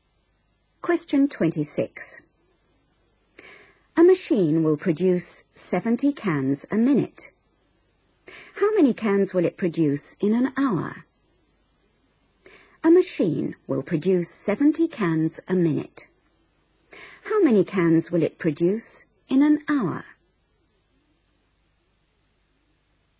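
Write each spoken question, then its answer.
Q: How many cans will it produce in an hour?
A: 4200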